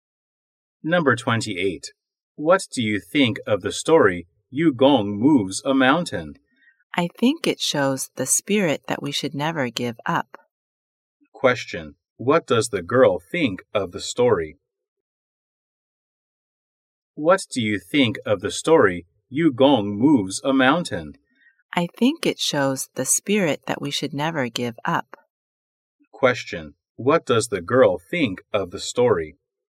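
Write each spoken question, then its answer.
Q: What does the girl think of the story?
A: It shows that we should never give up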